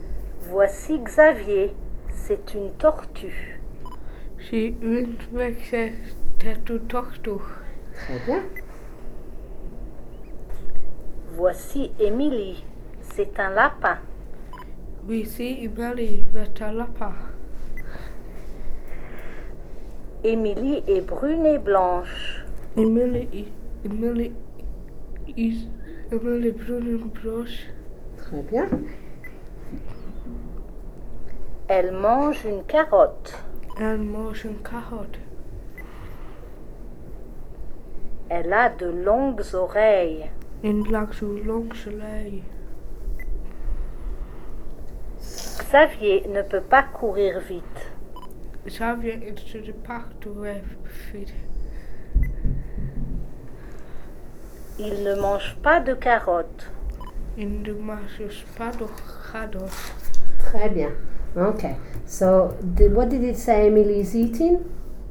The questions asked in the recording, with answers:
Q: So, what did it say Emily is eating?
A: Carottes.